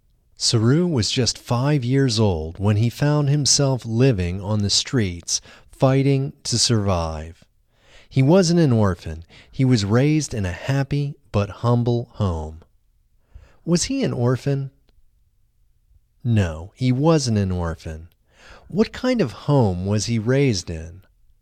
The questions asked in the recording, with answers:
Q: What kind of home was he raised in?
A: He was raised in a happy but humble home.